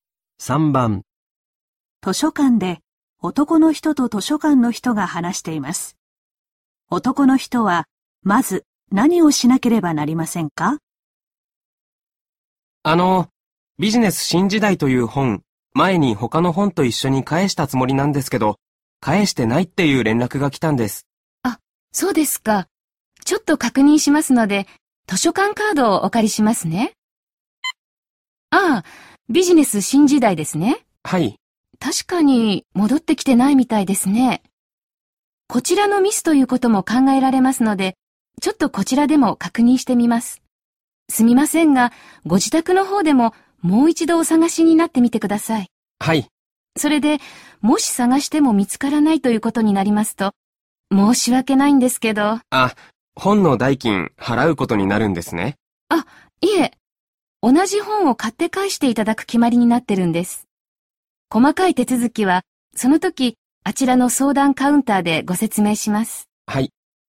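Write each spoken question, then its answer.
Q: 男の人はまず何をしなければなりませんか?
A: 自宅で本をもう一度探す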